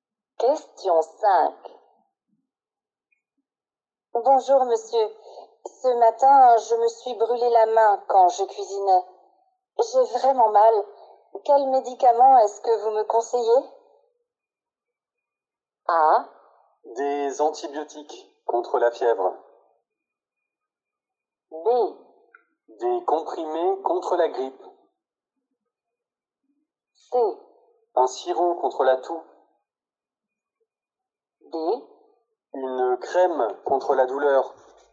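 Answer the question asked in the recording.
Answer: D: Une crème contre la douleur.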